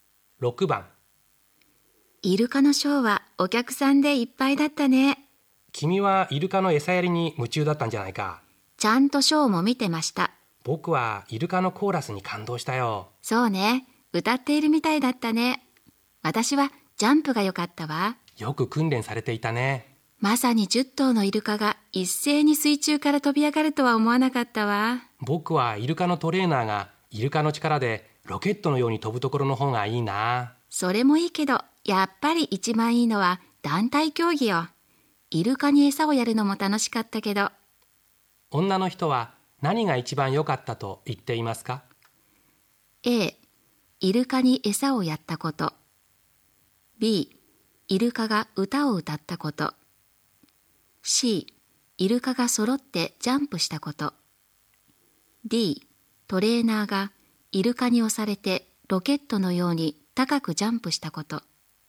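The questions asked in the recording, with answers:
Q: 女の人は何が一番良かったと言っていますか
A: C: イルカが揃ってジャンプしたこと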